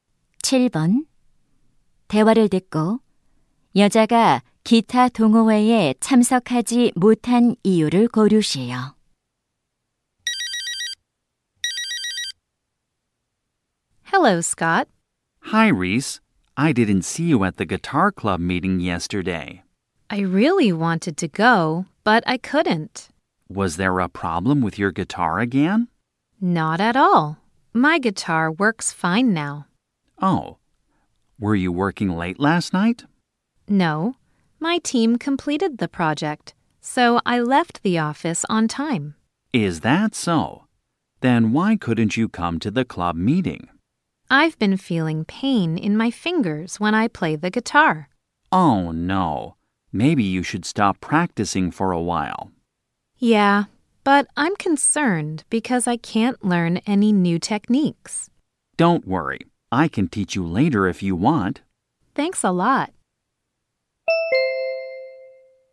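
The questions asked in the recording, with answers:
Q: 대화를 듣고 여자가 기타 동호회에 참석하지 못한 이유를 고르시오.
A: 기타를 칠 때 손가락이 아파서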